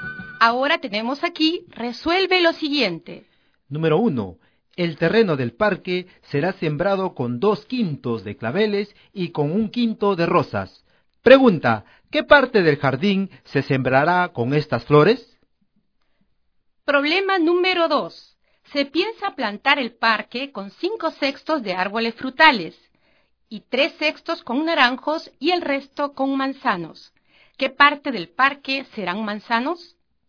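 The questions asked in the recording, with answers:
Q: ¿qué parte del jardín se sembrará con estas flores?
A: 3/5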